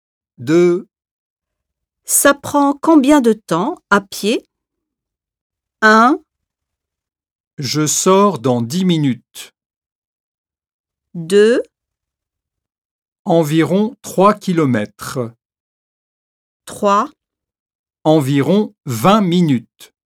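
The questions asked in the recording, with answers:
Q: Ça prend combien de temps à pied?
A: 3: Environ 20 minutes.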